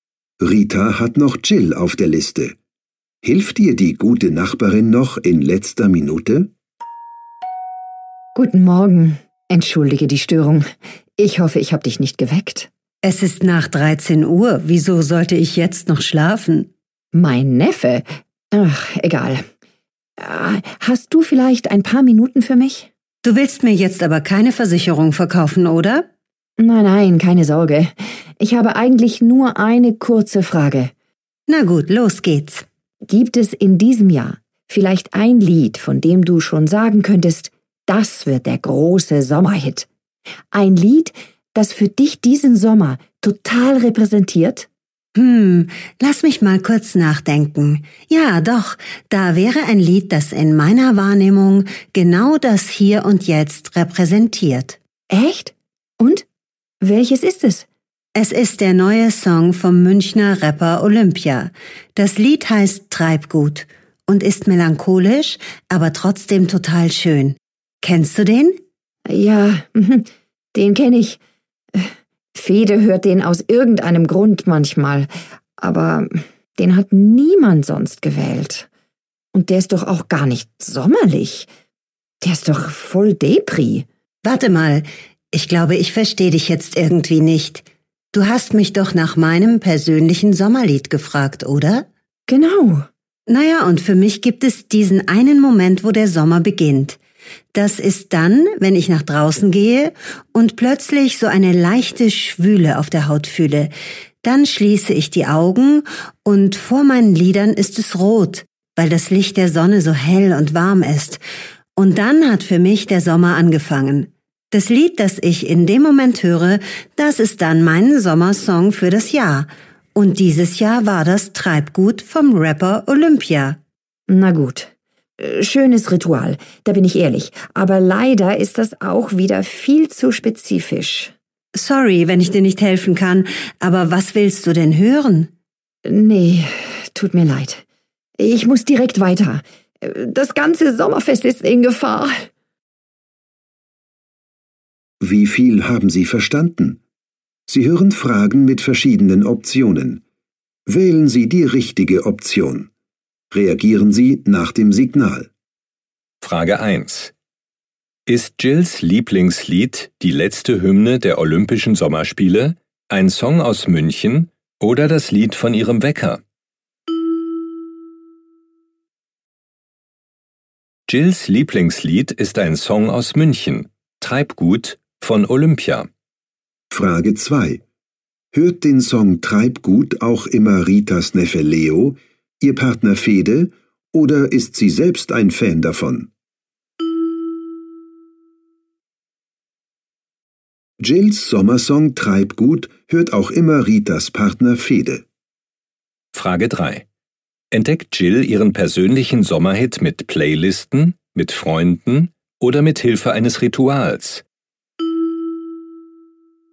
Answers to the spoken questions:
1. Jills Lieblingslied ist ein Song aus München, Treibgut von Olympia.
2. Jills Sommersong Treibgut hört auch immer Ritas Partner Fede.
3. Jill entdeckt ihren persönlichen Sommerhit mit Hilfe eines Rituals.